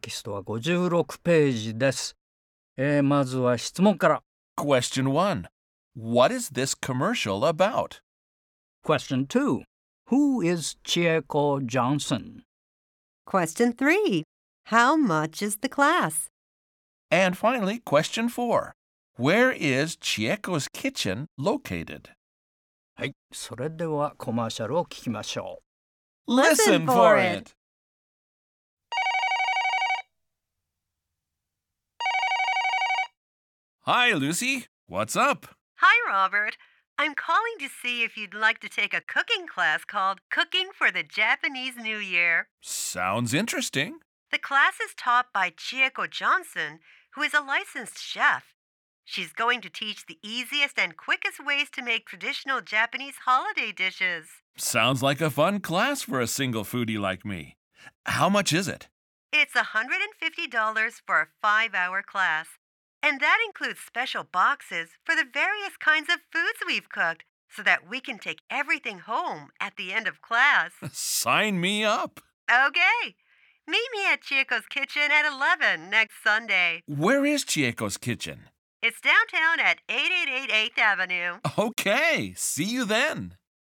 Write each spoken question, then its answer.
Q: What is this commercial about?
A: It's about a cooking class called Cooking for the Japanese New Year.

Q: Who is Chieko Johnson?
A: she is the licensed chef who is the teacher of the class.

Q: How much is the class?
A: It's $150 or $150.